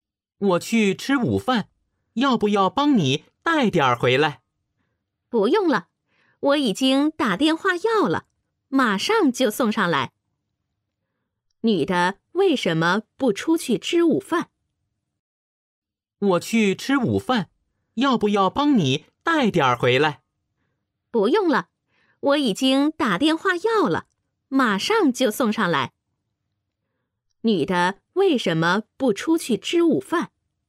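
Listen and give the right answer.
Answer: 她已经打电话要了外卖,马上送上来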